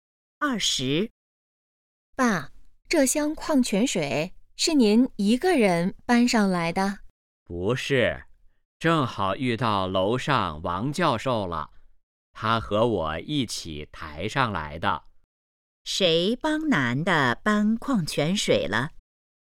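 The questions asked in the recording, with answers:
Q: 谁帮男的搬矿泉水了?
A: 王教授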